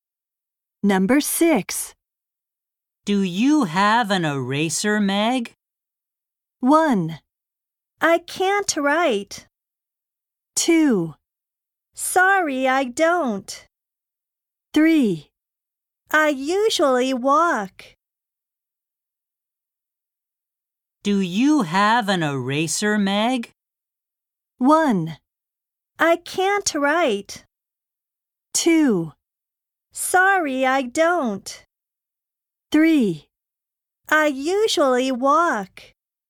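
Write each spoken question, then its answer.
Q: Do you have an eraser, Meg?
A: 2: Sorry, I don't.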